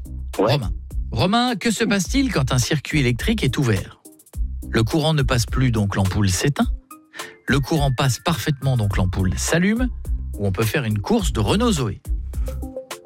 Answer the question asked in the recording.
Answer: La première, ça s'éteint.